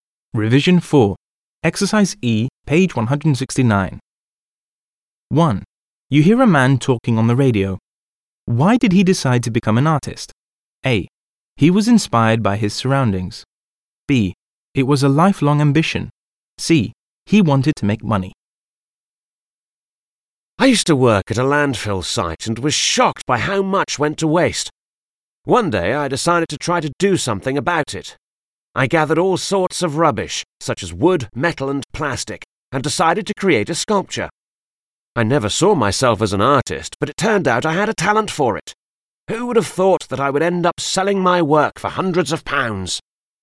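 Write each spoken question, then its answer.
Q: Why did he decide to become an artist?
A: A: He was inspired by his surroundings.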